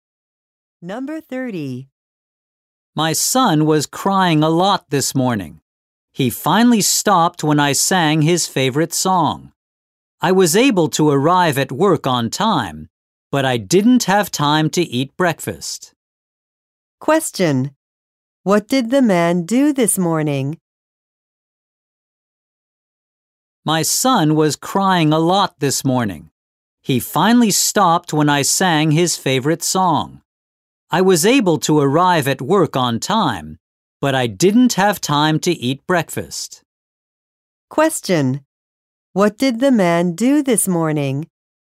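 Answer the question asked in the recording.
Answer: He sang a song to his son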